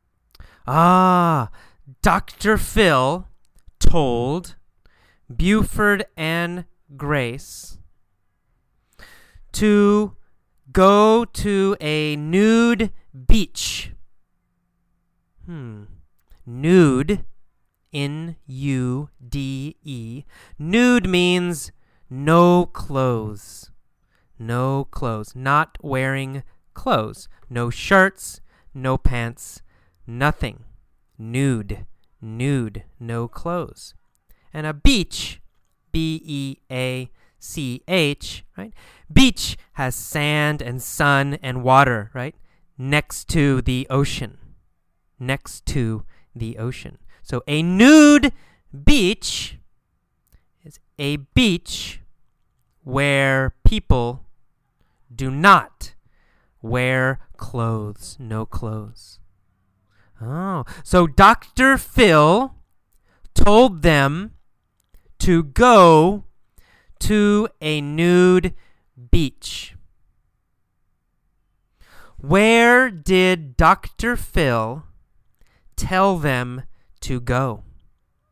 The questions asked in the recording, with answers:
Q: Where did Dr. Phil tell them to go?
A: He told them to go to a nude beach.